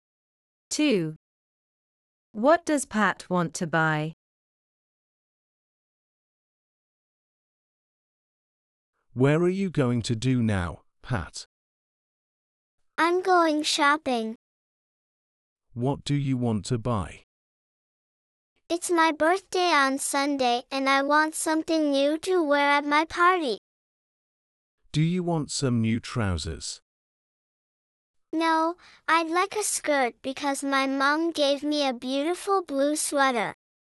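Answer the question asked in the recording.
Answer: A skirt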